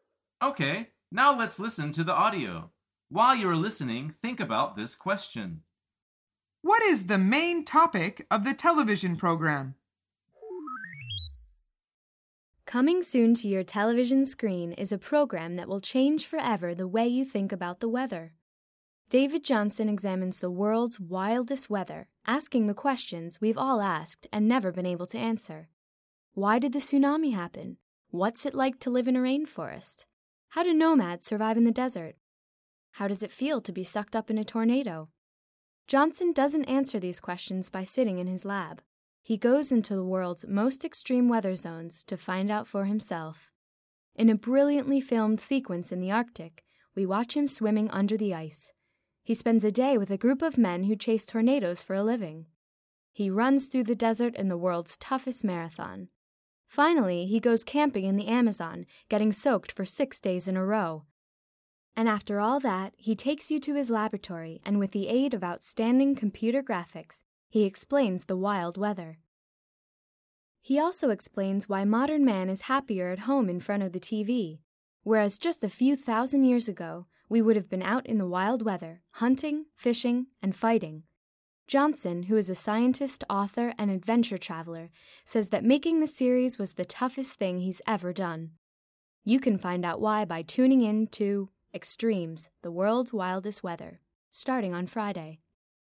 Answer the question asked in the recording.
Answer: The answer is extreme weather.